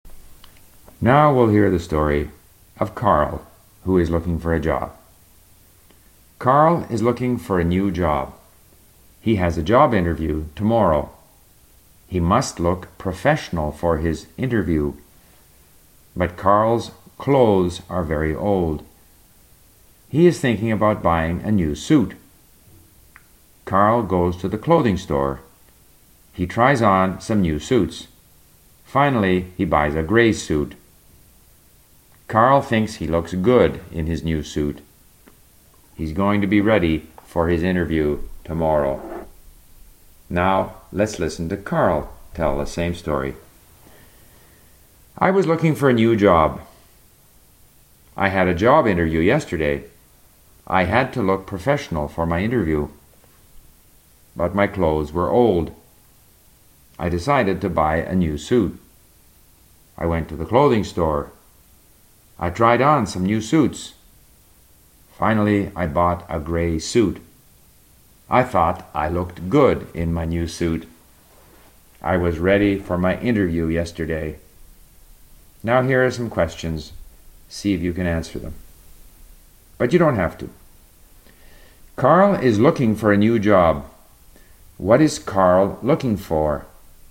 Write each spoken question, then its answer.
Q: What is Carl looking for?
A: He is looking for a new job.